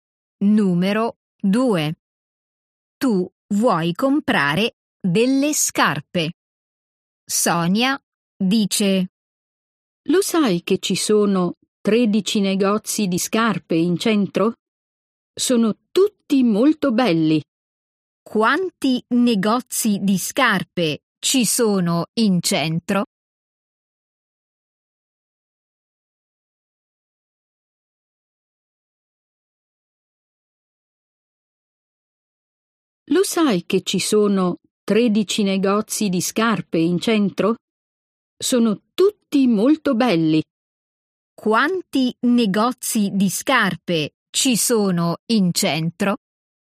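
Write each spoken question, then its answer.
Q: Quanti negozi di scarpe ci sono in centro?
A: 13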